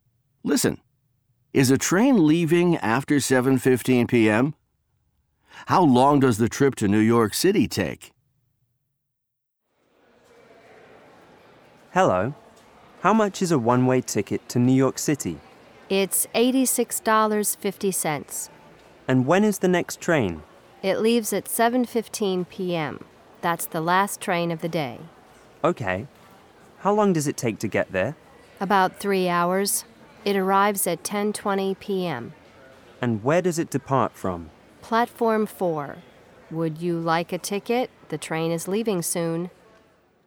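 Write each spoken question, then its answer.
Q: Is a train leaving after 7:15 p.m.?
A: No, 7:15 p.m. is the last train of the day.

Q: How long does the trip to New York City take?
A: About 3 hours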